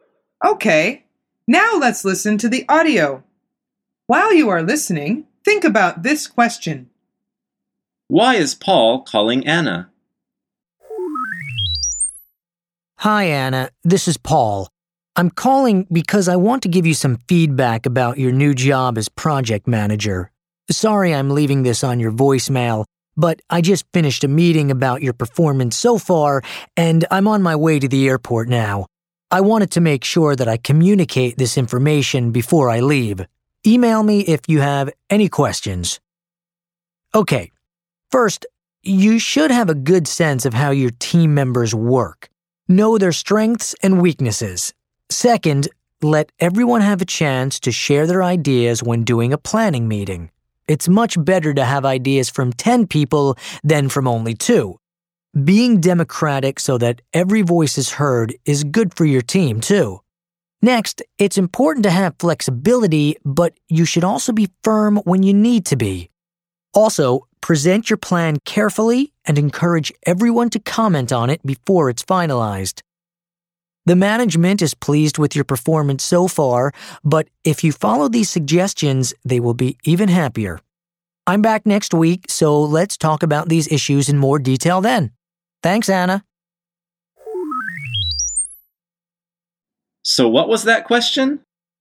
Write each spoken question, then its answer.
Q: Why is Paul calling Anna?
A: The answer is to give her feedback on her new job.